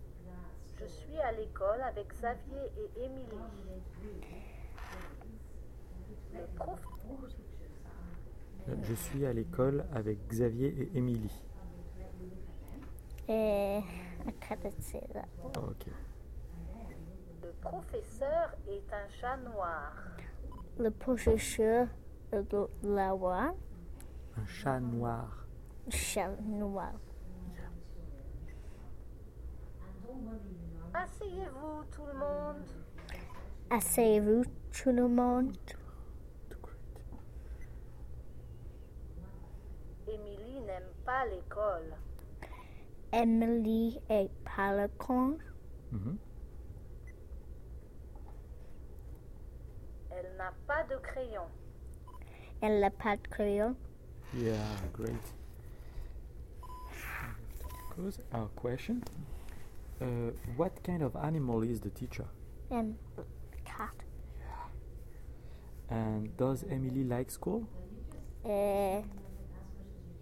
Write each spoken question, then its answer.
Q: What kind of animal is the teacher?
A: Cat.

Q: And does Emily like school?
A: No.